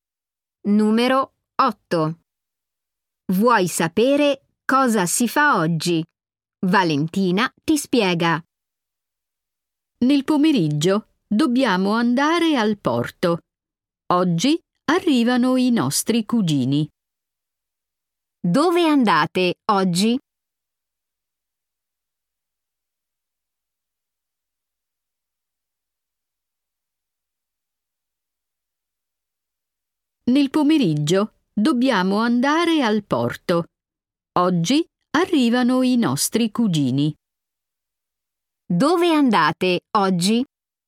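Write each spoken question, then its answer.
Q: Dove andate oggi?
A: Al porto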